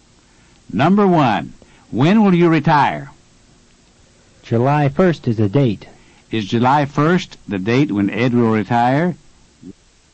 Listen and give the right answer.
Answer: Yes, it is.